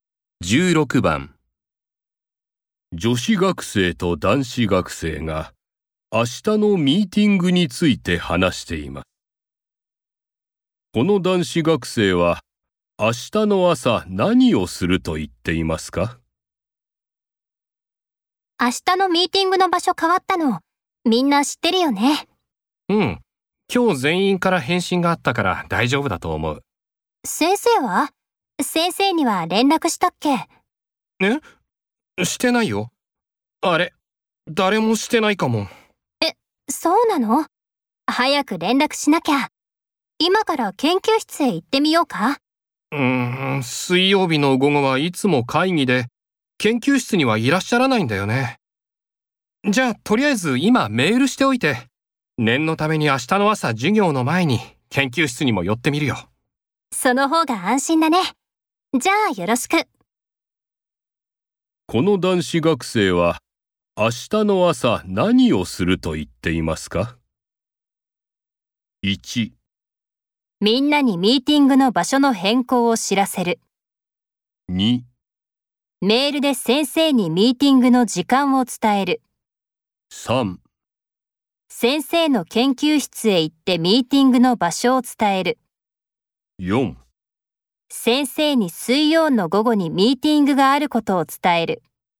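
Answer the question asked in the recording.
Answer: 3: 先生の研究室へ行ってミーティングの場所を伝える。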